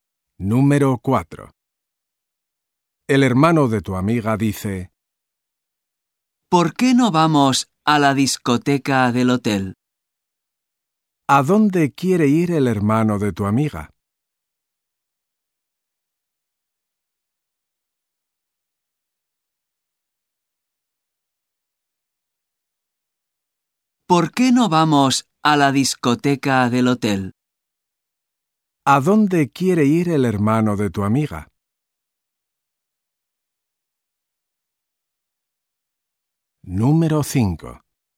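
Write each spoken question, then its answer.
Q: ¿A dónde quiere ir el hermano de tu amiga?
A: A la discoteca del hotel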